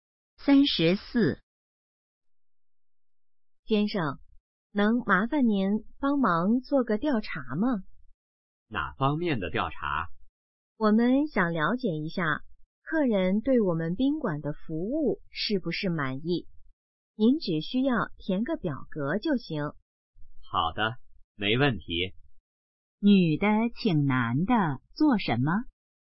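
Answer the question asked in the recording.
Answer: 填表格,做调查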